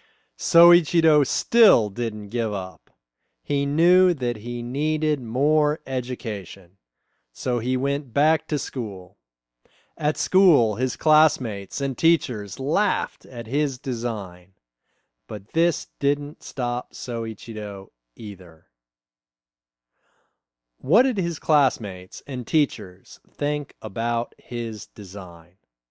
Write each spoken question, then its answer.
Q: What did his classmates and teachers think about his design?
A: They laughed at his design.